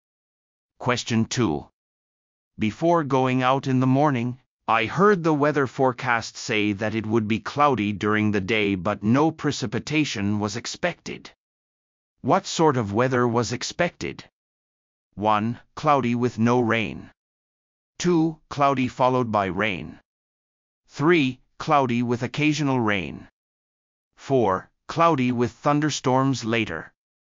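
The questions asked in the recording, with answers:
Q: What sort of weather was expected?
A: 1: Cloudy with no rain.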